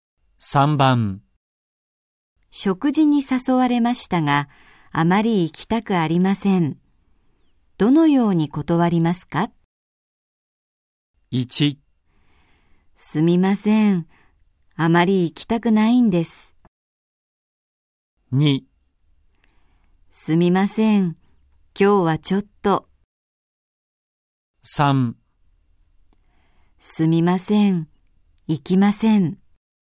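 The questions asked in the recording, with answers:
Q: 食事に誘われましたが、あまり行きたくありません。どのように断りますか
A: 2: すみません。今日はちょっと。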